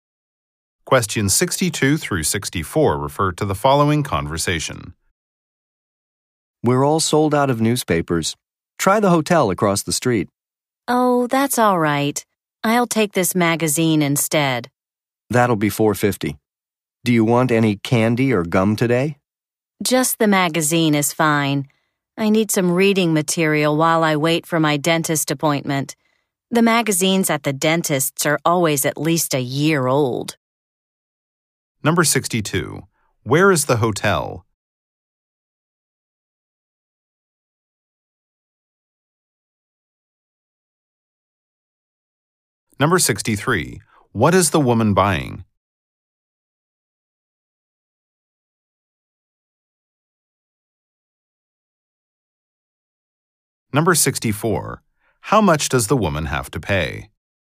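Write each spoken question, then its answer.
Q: Where is the hotel?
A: Across the street

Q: What is the woman buying?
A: A magazine

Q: How much does the woman have to pay?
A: $4.50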